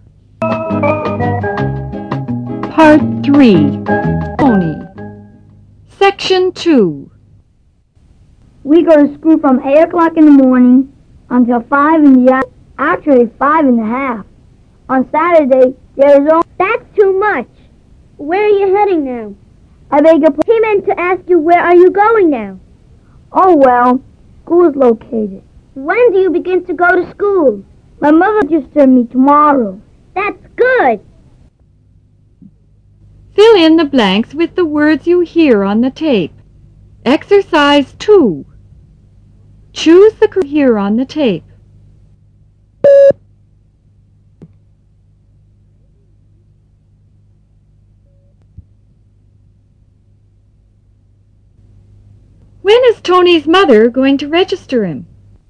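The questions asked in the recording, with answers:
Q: When is Tony's mother going to register him?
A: Tomorrow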